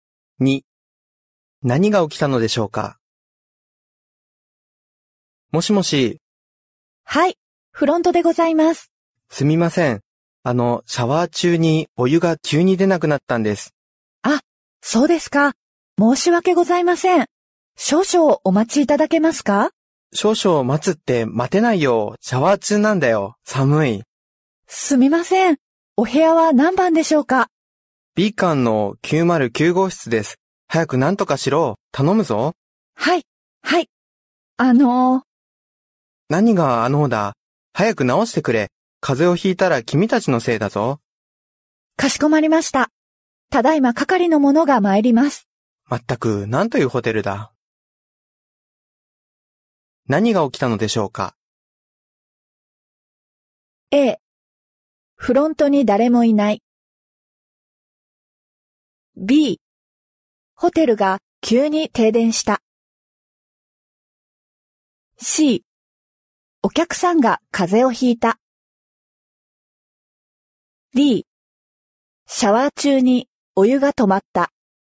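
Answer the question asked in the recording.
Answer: D: シャワー中にお湯が止まった。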